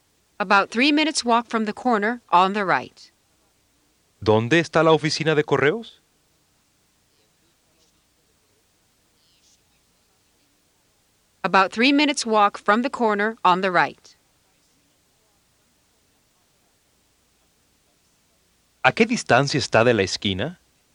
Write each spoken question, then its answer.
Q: ¿A qué distancia está de la esquina?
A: 3 minutes walk.